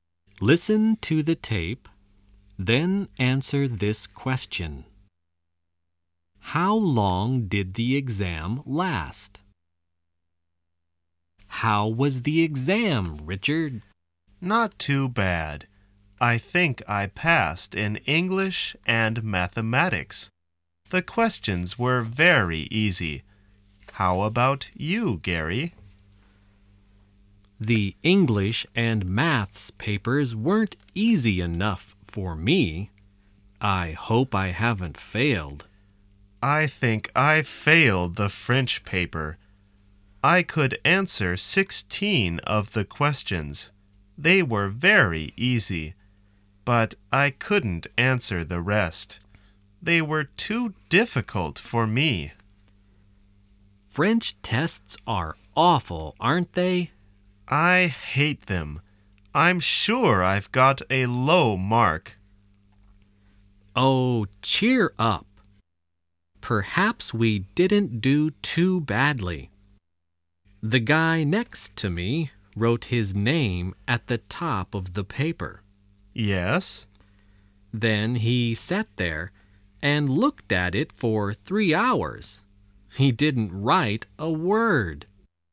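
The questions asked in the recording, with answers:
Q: How long did the exam last?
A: 3 hours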